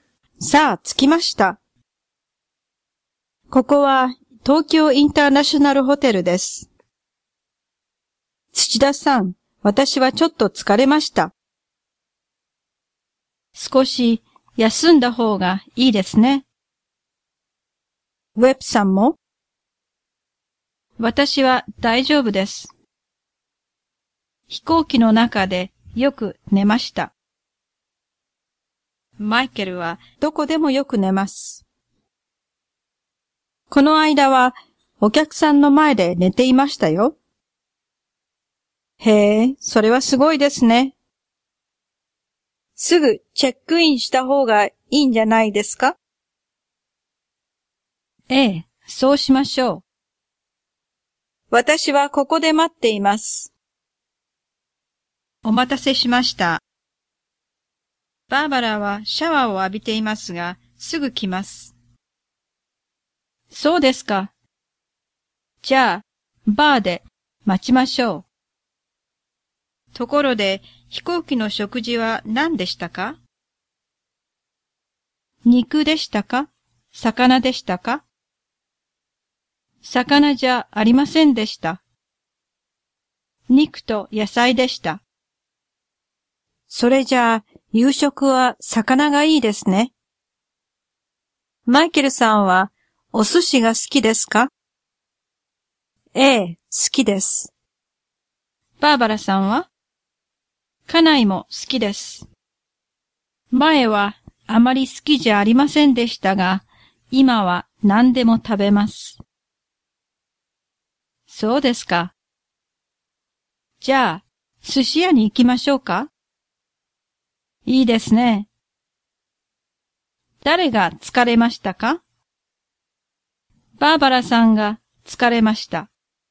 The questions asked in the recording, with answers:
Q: 誰が疲れましたか?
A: バーバラさんが疲れました。